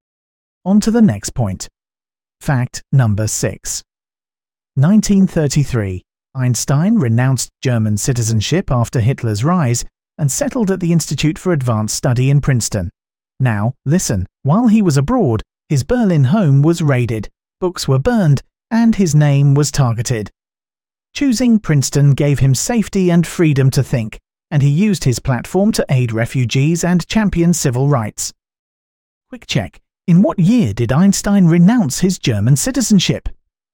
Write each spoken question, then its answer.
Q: in what year did Einstein renounce his German citizenship?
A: Correct answer, 1933.